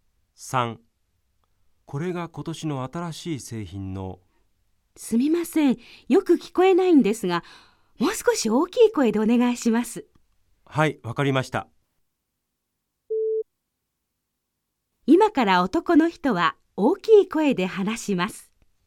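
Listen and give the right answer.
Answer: ○(正しい)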